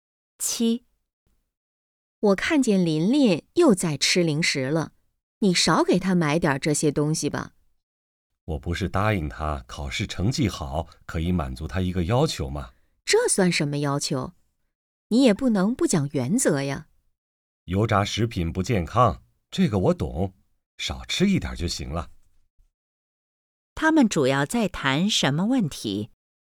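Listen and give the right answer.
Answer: 孩子(琳琳)吃零食的问题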